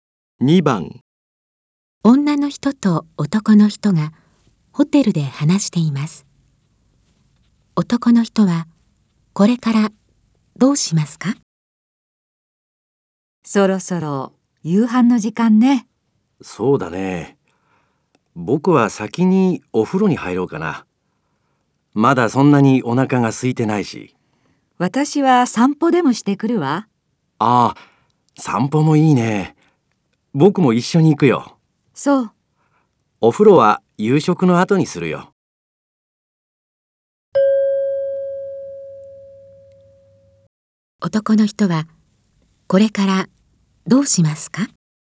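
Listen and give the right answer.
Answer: 女の人と一緒に散歩に行く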